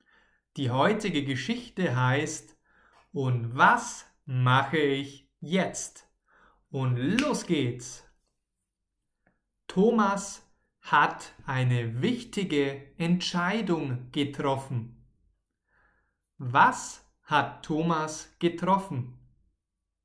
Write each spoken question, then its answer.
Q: Was hat Thomas getroffen?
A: Eine wichtige Entscheidung.